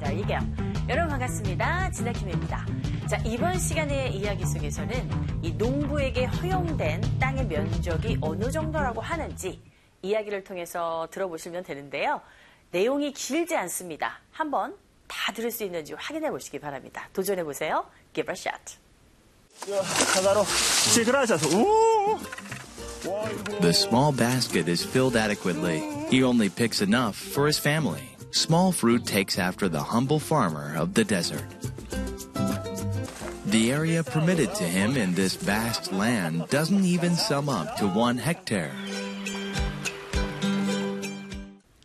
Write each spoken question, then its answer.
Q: 이 농부에게 허용된 땅의 면적이 어느 정도라고 하는지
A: 1헥타르조차도 되지 않는다.